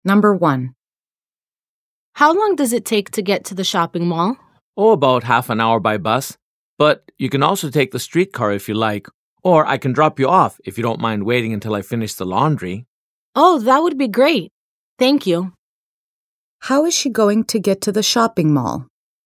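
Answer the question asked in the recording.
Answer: By car (the other speaker will drive her there)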